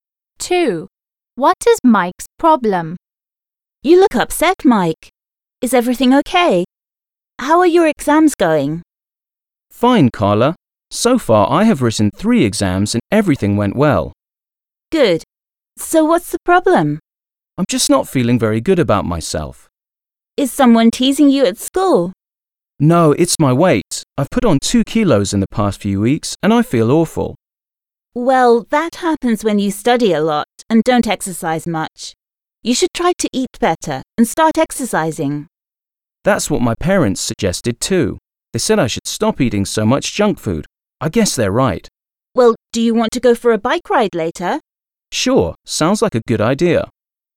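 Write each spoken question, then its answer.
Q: What is Mike's problem?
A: He has put on weight (2 kilos)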